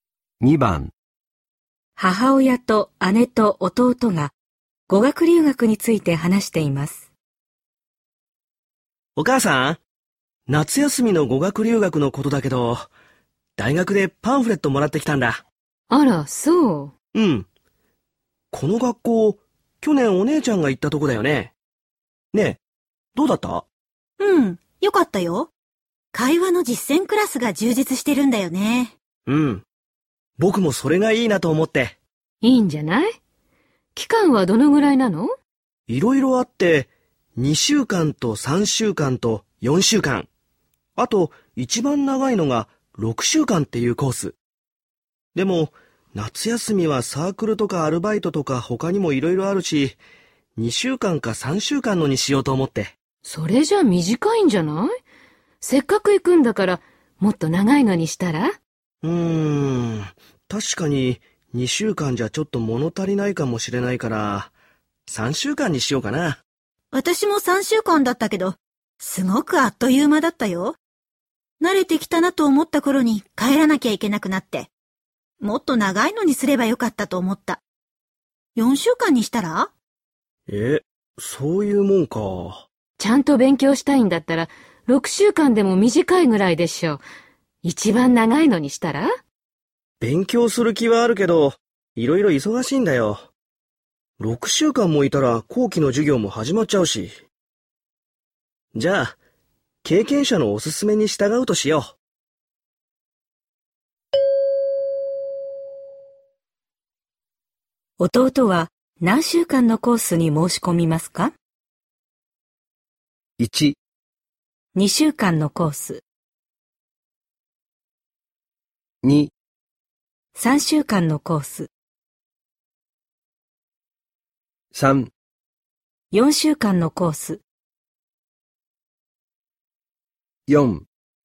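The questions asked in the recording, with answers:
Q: 弟は何週間のコースに申し込みますか?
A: 3: 4週間のコース。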